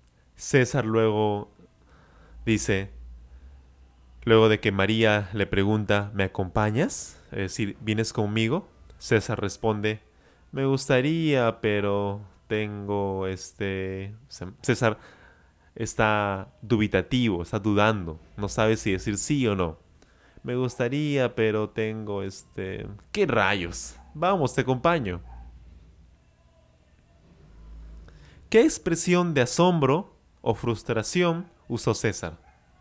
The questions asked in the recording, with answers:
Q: ¿Qué expresión de asombro o frustración usó César?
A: César usó la expresión ¿qué rayos?